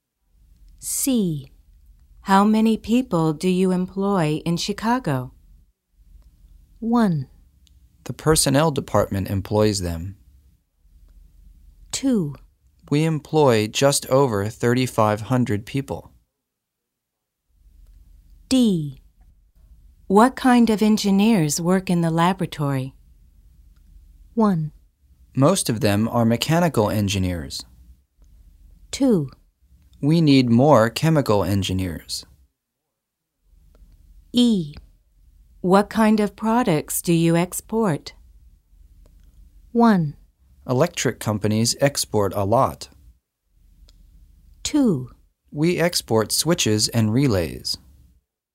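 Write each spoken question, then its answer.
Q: How many people do you employ in Chicago?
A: 2: We employ just over 3,500 people.

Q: What kind of engineers work in the laboratory?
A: 1: Most of them are mechanical engineers.

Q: What kind of products do you export?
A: 2: We export switches and relays.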